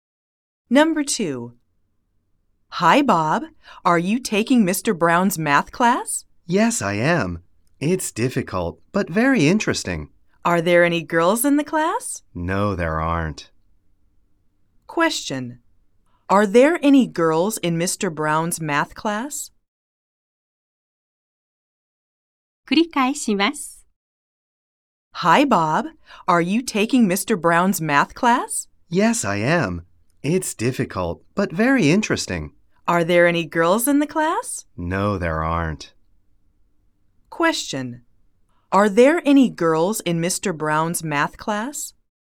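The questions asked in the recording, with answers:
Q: Are there any girls in Mr. Brown's math class?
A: No, there aren't.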